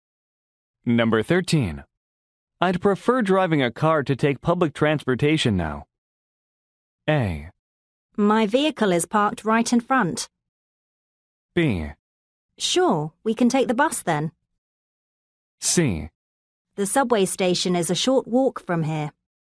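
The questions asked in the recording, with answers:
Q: I'd prefer driving a car to take public transportation now.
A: A: My vehicle is parked right in front.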